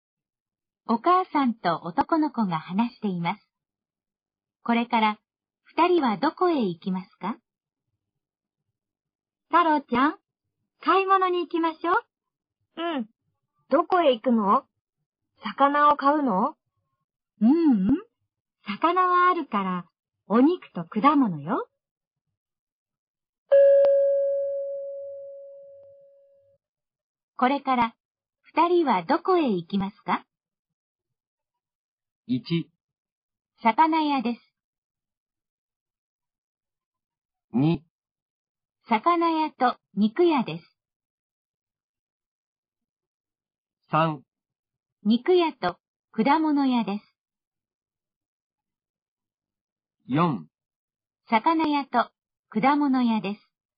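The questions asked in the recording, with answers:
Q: これから二人はどこへ行きますか?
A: 3: 肉屋と果物屋です。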